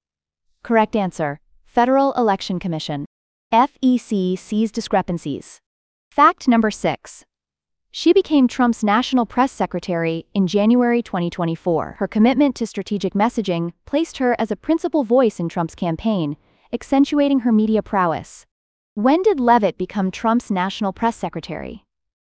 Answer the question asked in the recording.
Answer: Correct answer, January 2024.